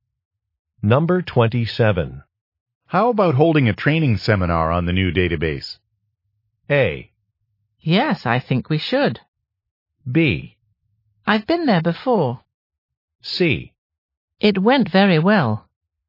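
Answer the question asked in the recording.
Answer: A: Yes, I think we should.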